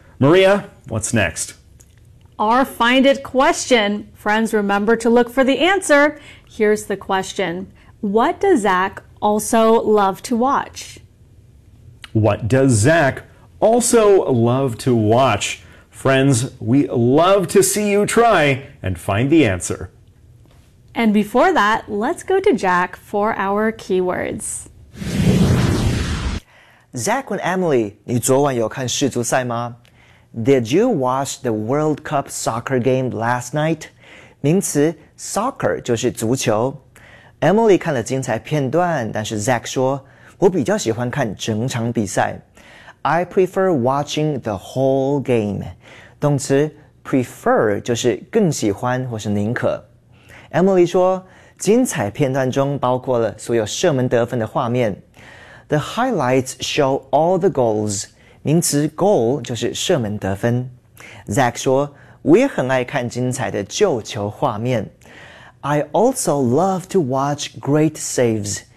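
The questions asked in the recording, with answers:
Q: What does Zach also love to watch?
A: great saves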